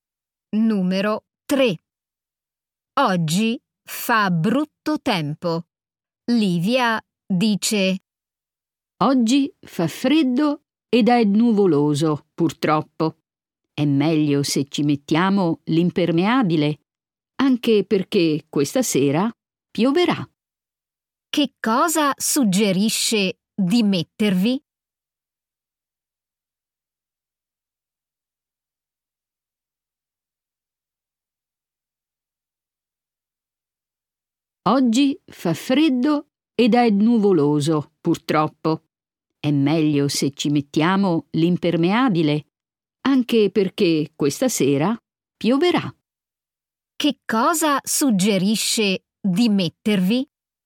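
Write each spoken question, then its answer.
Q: Che cosa suggerisce di mettervi?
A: L'impermeabile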